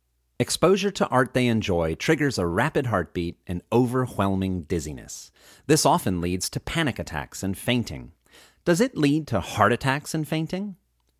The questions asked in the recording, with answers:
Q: Does it lead to heart attacks and fainting?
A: No, it doesn't lead to heart attacks and fainting.